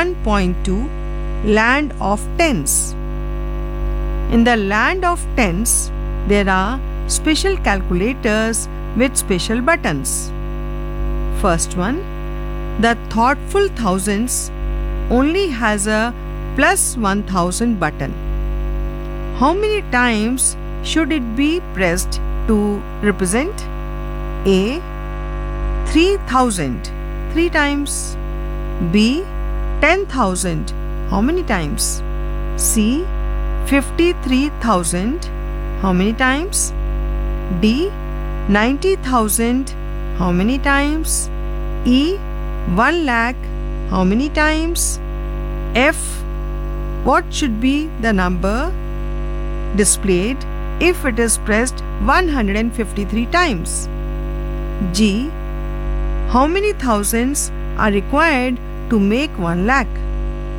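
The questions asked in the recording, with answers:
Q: B 10,000, how many times?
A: 10 times

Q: C 53,000, how many times?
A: 53 times

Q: D 90,000, how many times?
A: 90 times

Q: E 1 lakh, how many times?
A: 100 times

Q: F what should be the number displayed if it is pressed 153 times?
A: 1,53,000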